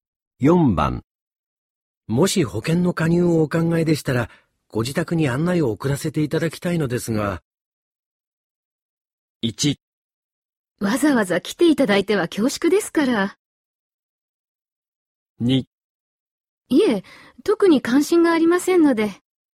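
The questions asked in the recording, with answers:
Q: もし保険の加入をお考えでしたら、ご自宅に案内を送らせていただきたいのですが。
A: 2: いえ、特に関心がありませんので。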